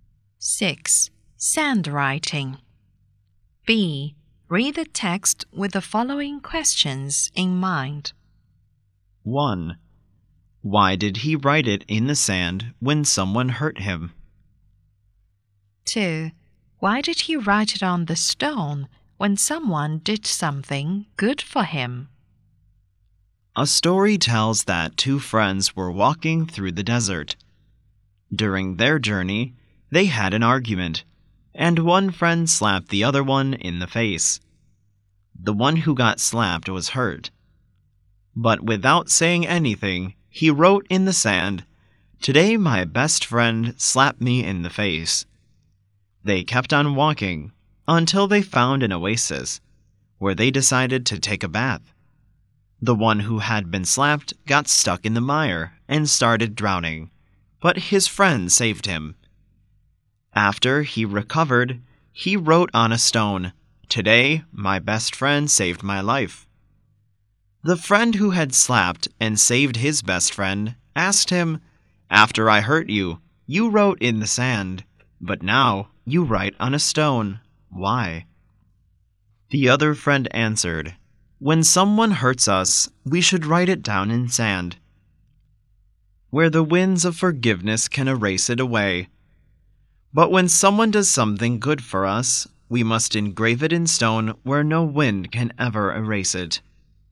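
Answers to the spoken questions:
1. So the winds of forgiveness can erase it
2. So no wind can ever erase it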